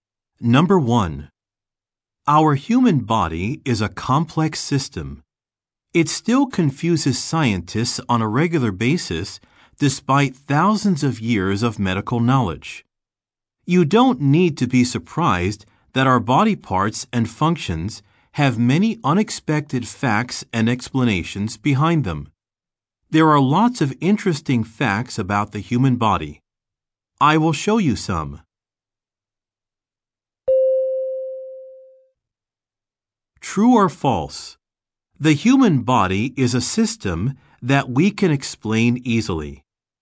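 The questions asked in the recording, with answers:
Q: True or false? The human body is a system that we can explain easily.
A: False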